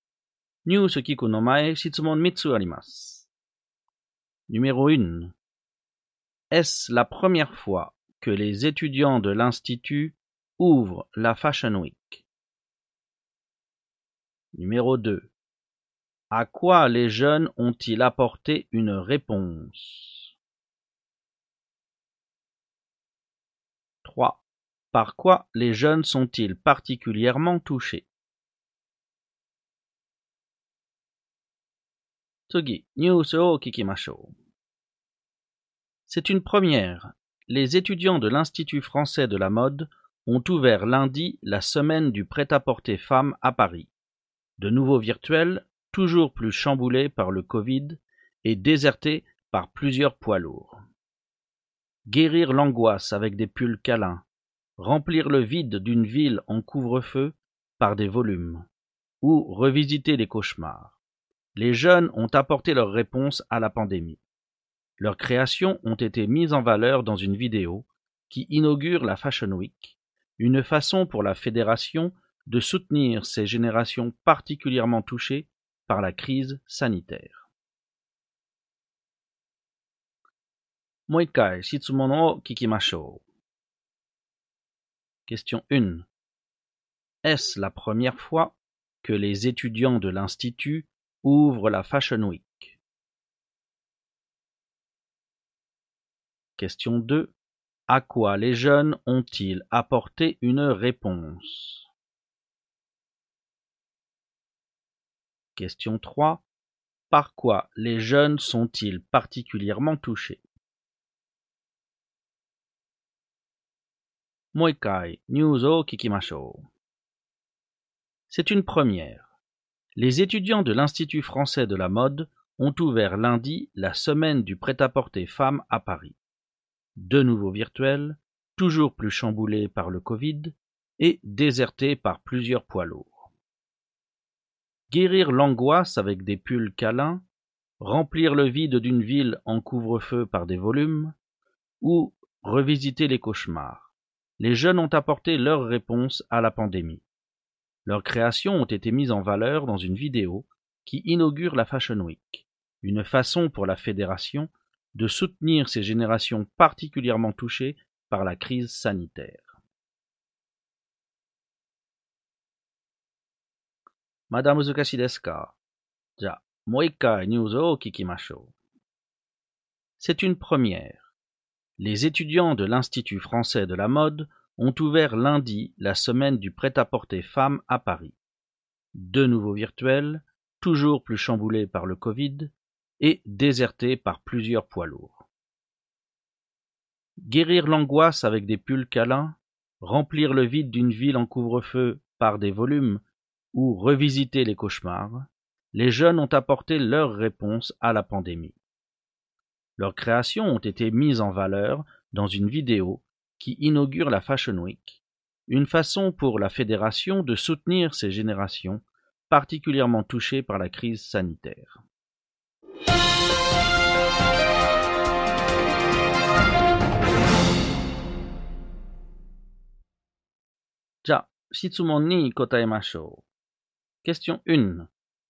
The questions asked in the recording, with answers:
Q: Est-ce la première fois que les étudiants de l'Institut ouvrent la Fashion Week?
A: Oui, c'est une première.

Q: À quoi les jeunes ont-ils apporté une réponse?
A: Les jeunes ont apporté une réponse à la pandémie.

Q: Par quoi les jeunes sont-ils particulièrement touchés?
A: Les jeunes sont particulièrement touchés par la crise sanitaire.